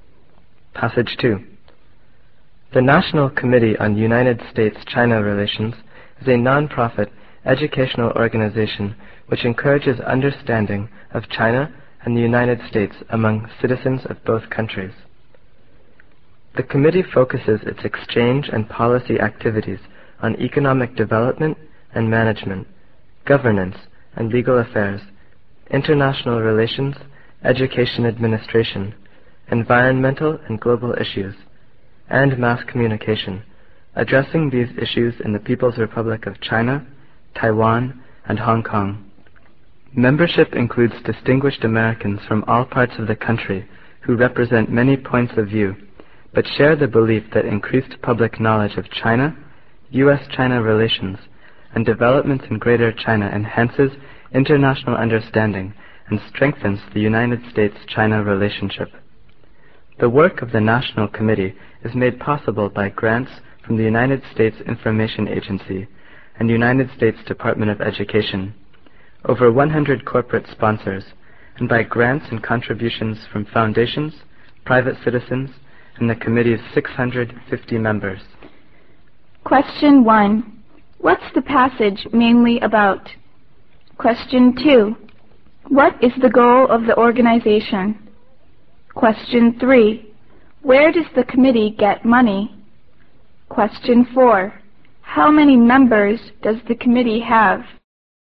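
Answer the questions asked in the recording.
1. The National Committee on United States-China Relations
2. To encourage understanding of China and the United States among citizens of both countries
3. Grants from the USIA and the Department of Education, corporate sponsors, foundations, private citizens and members
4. 650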